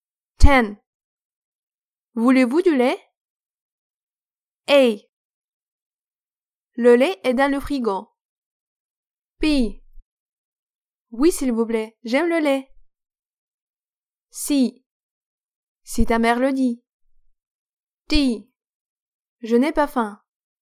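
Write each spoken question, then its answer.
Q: Voulez-vous du lait?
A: B: Oui, s'il vous plaît, j'aime le lait.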